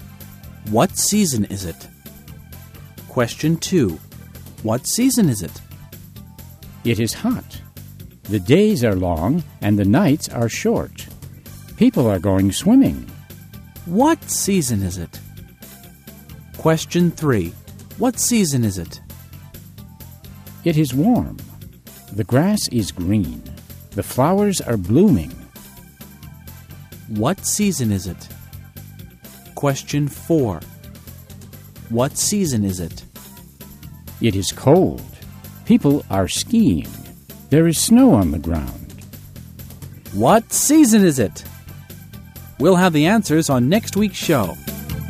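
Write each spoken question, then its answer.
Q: What season is it?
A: Summer

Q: What season is it?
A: Spring

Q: What season is it?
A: Winter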